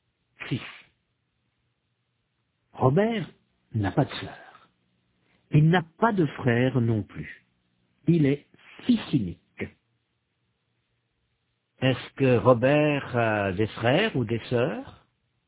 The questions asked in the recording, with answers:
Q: Est-ce que Robert a des frères ou des sœurs?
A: Non, il est fils unique.